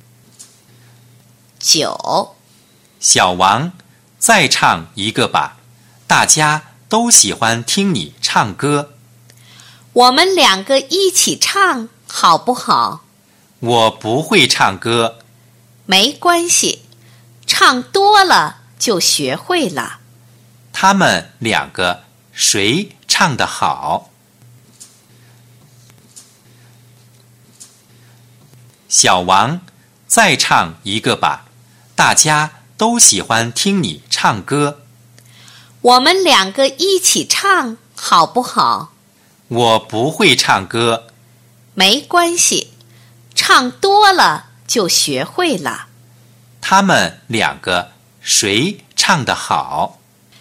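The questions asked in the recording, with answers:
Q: 他们两个谁唱得好?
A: 小王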